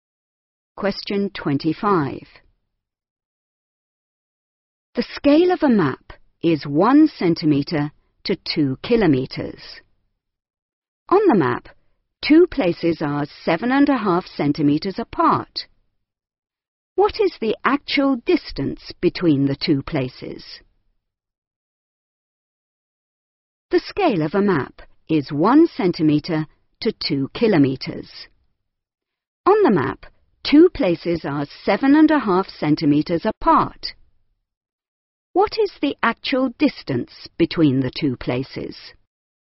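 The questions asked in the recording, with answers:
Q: What is the actual distance between the two places?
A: 15 kilometres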